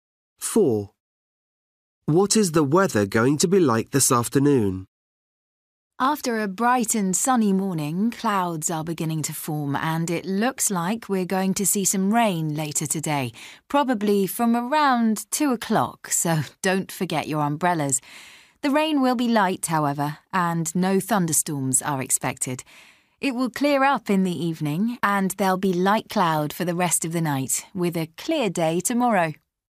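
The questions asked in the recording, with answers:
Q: What is the weather going to be like this afternoon?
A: light rain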